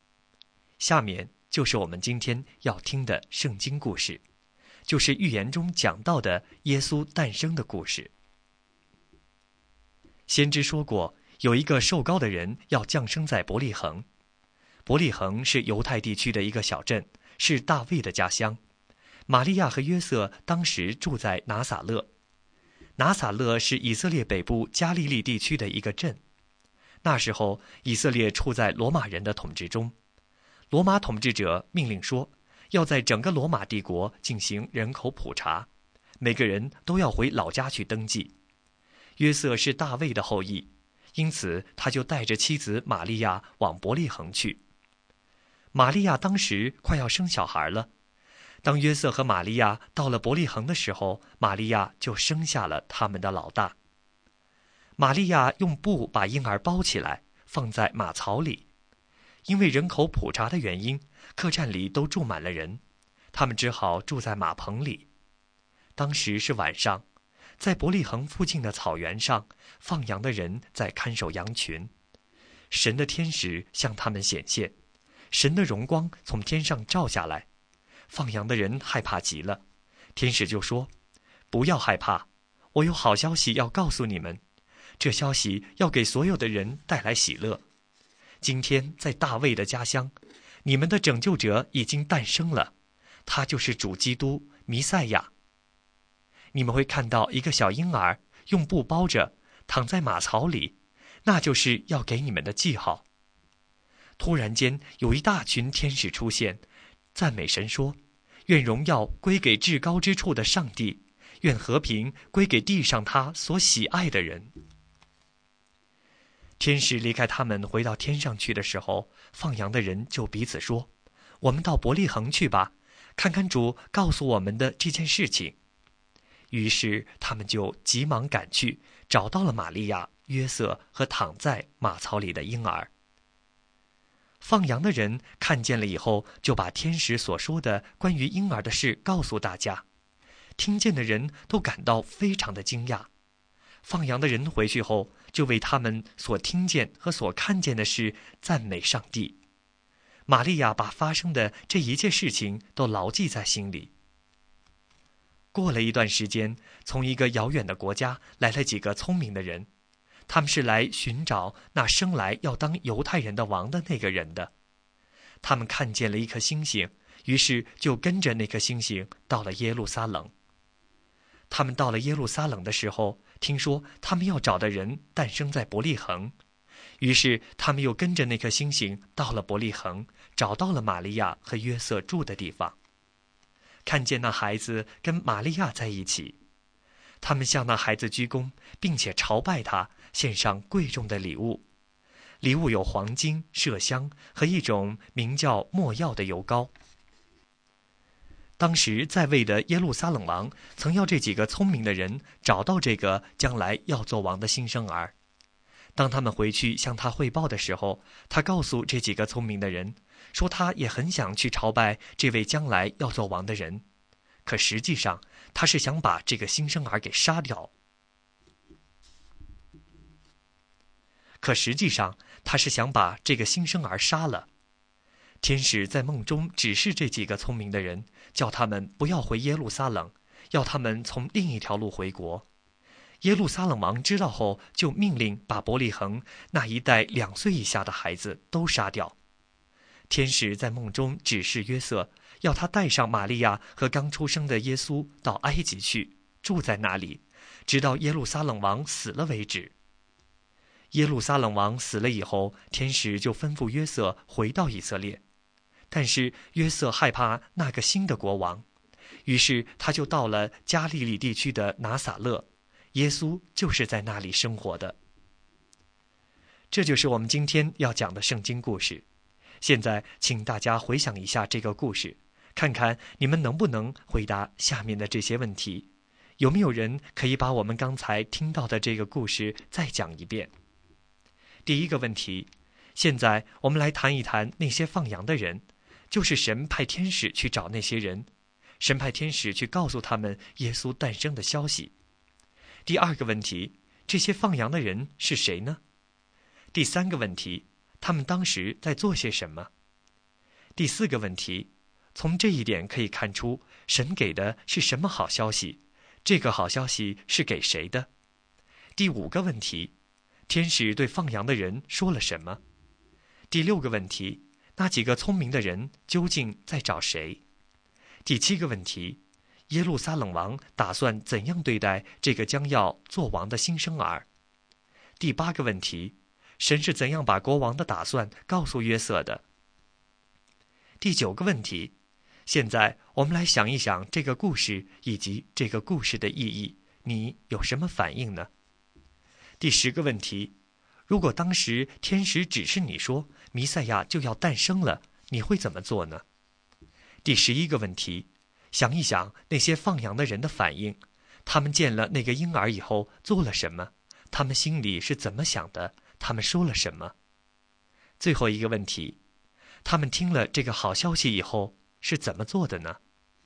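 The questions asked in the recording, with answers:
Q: 他们当时在做些什么?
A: 晚上在伯利恒附近的草原上看守羊群

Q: 天使对放羊的人说了什么?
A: 不要害怕,有好消息:拯救者主基督弥赛亚在大卫的家乡诞生了,婴儿用布包着躺在马槽里

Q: 那几个聪明的人究竟在找谁?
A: 生来要当犹太人的王的那个人(耶稣)

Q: 耶路撒冷王打算怎样对待这个将要做王的新生儿?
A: 想把他杀掉

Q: 神是怎样把国王的打算告诉约瑟的?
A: 天使在梦中指示约瑟

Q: 他们听了这个好消息以后是怎么做的呢?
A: 急忙去伯利恒找到婴儿,把天使的话告诉大家,并赞美上帝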